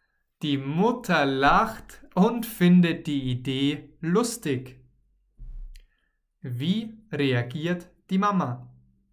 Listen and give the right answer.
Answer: Sie lacht und findet die Idee lustig.